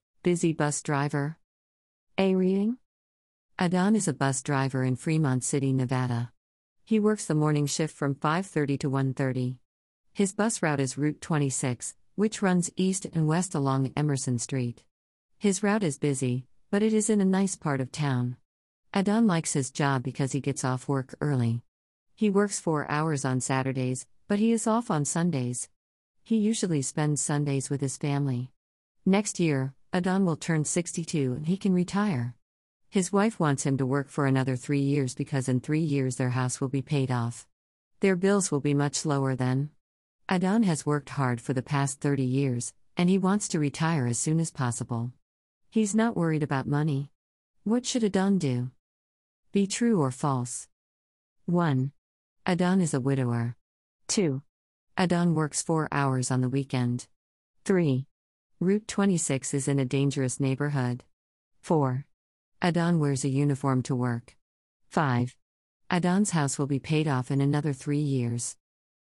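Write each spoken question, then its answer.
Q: Adan is a widower.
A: False

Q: Adan works 4 hours on the weekend.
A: True

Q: Route 26 is in a dangerous neighborhood.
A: False

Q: Adan's house will be paid off in another 3 years.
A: True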